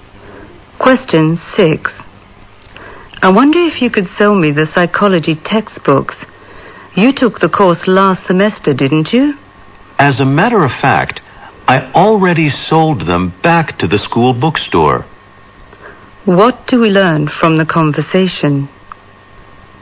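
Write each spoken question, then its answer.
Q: What do we learn from the conversation?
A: The man already sold his psychology textbooks back to the school bookstore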